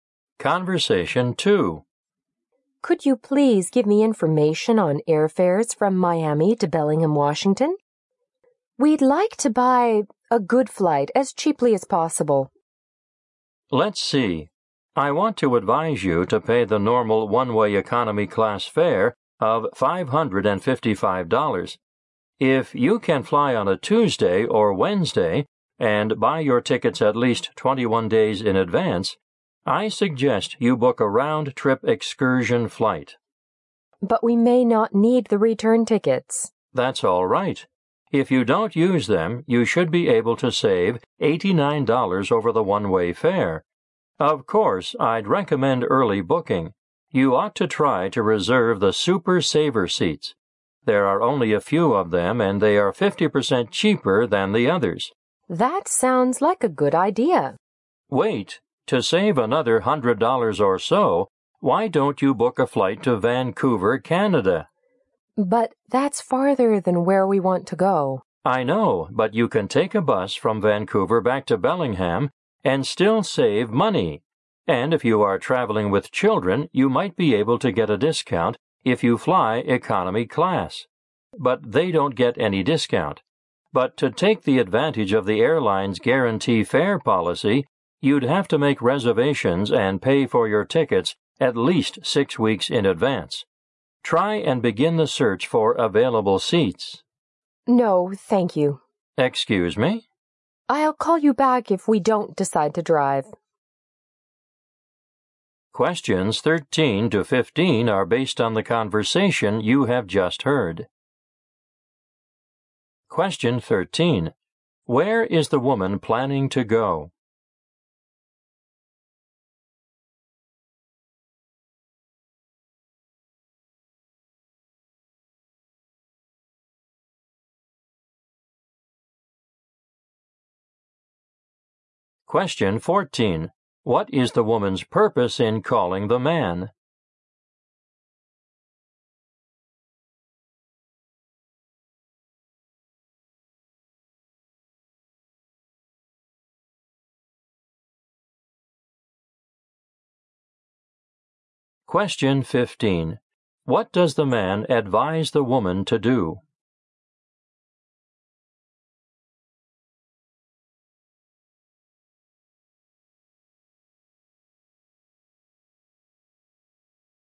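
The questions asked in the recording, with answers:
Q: Where is the woman planning to go?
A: Bellingham, Washington.

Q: What is the woman's purpose in calling the man?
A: To get information on airfares and find a cheap flight.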